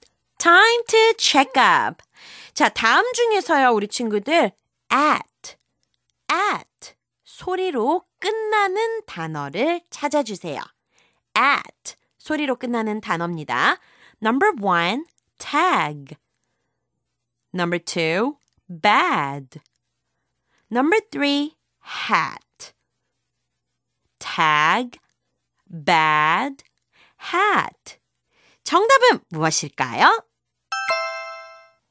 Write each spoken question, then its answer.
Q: at 소리로 끝나는 단어를 찾아주세요.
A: 정답은 바로 number three가 되겠죠. hat.